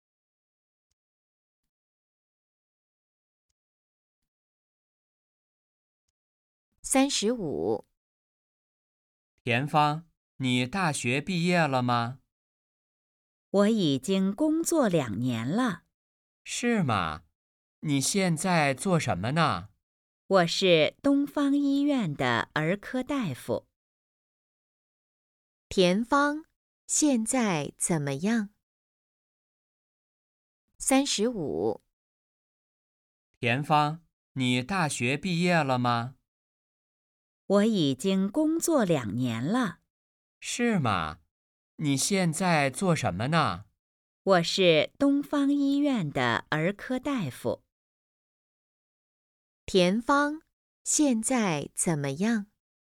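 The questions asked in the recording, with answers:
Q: 田芳现在怎么样?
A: 是东方医院的儿科大夫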